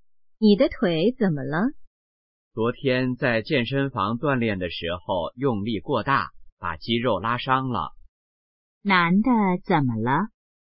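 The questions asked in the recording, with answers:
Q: 男的怎么了?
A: 腿部肌肉拉伤了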